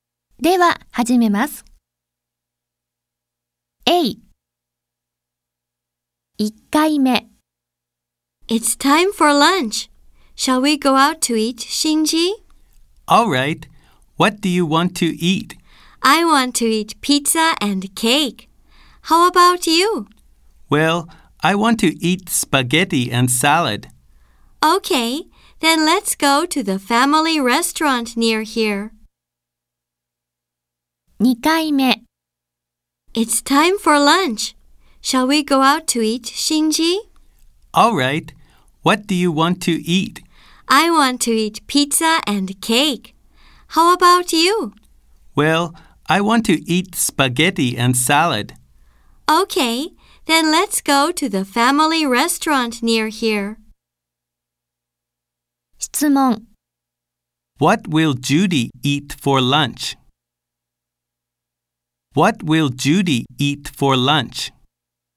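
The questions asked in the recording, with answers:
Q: What will Judy eat for lunch?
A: Pizza and cake.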